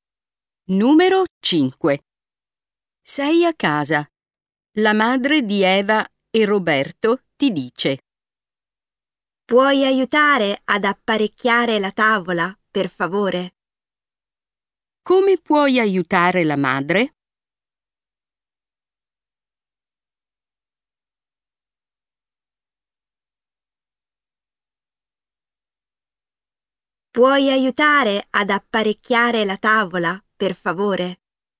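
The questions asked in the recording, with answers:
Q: Come puoi aiutare la madre?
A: apparecchiando la tavola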